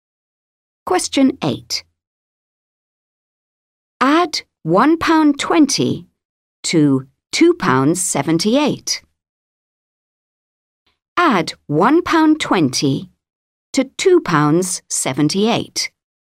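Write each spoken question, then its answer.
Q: Add £1.20 to £2.78.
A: £3.98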